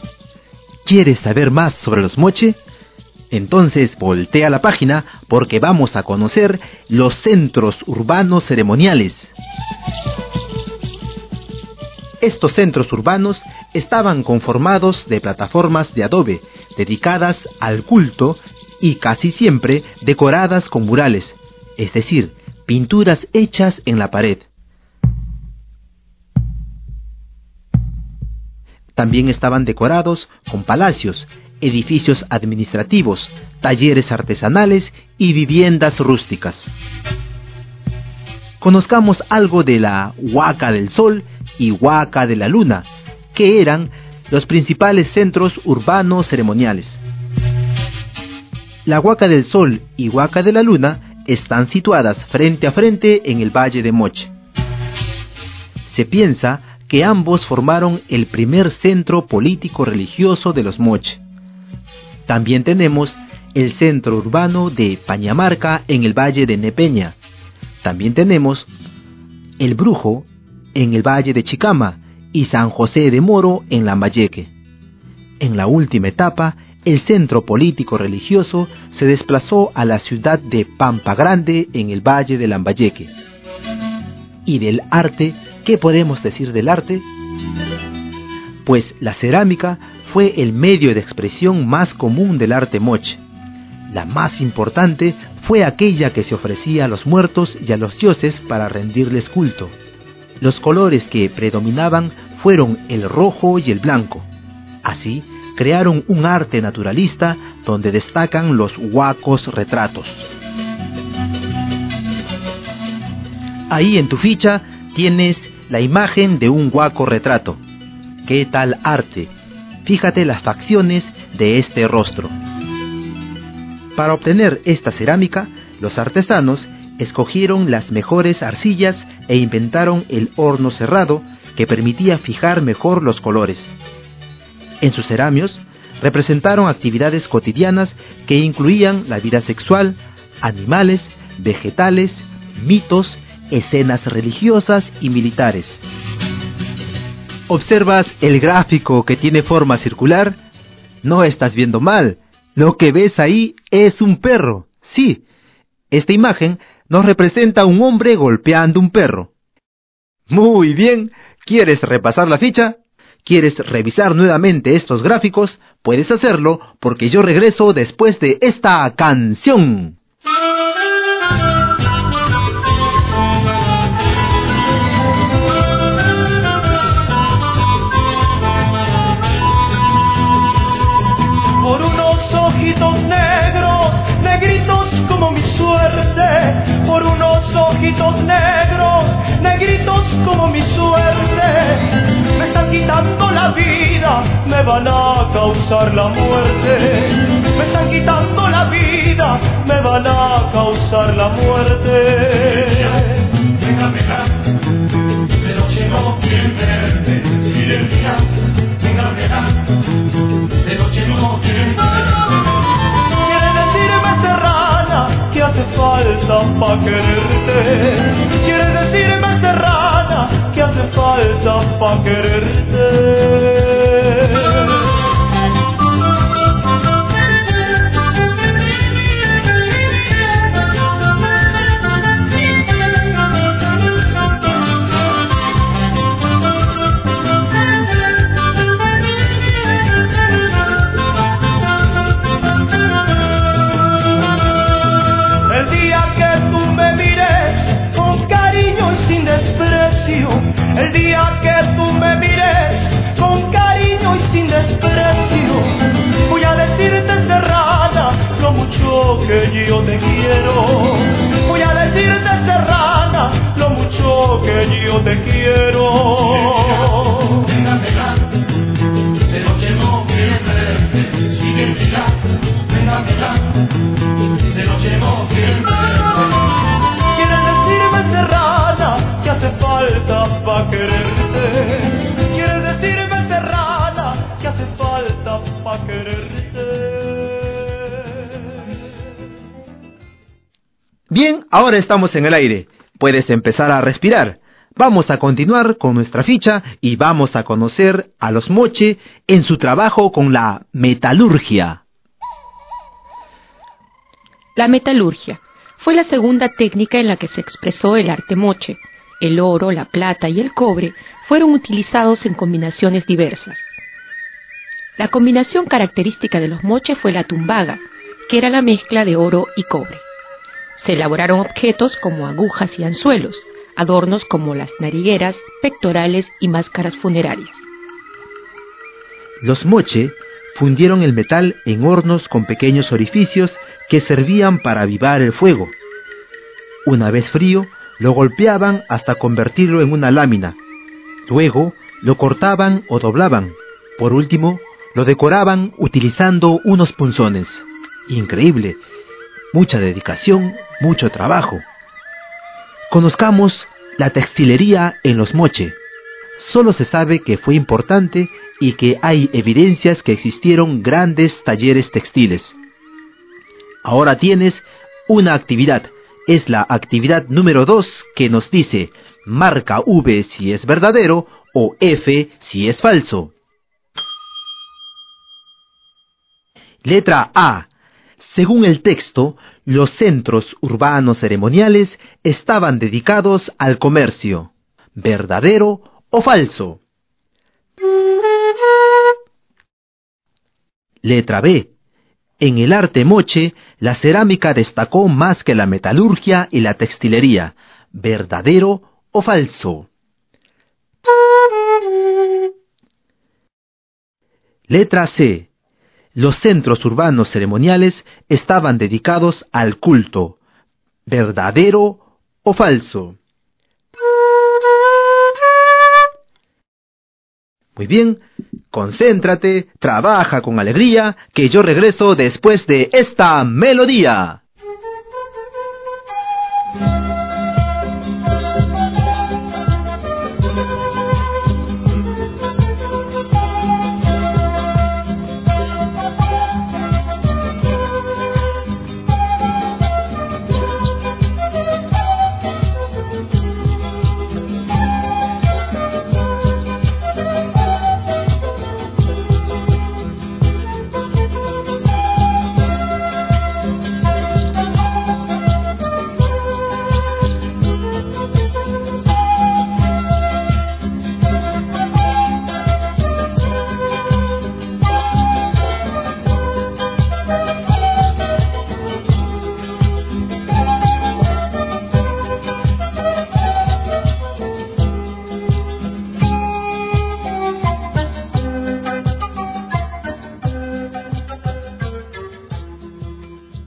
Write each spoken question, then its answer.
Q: Según el texto, los centros urbanos ceremoniales estaban dedicados al comercio.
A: Esto no es verdadero. Esto es falso.

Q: En el arte Moche, la cerámica destacó más que la metalurgia y la textilería.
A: Esta alternativa es verdadera.

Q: Los centros urbanos ceremoniales estaban dedicados al culto.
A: la alternativa C es verdadera.